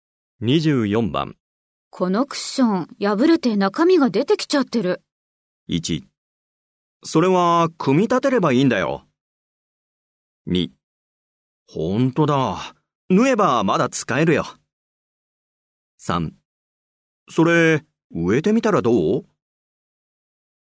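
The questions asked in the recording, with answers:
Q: このクッション、破れて中身が出てきちゃってる。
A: 2: ほんとだ。縫えばまだ使えるよ。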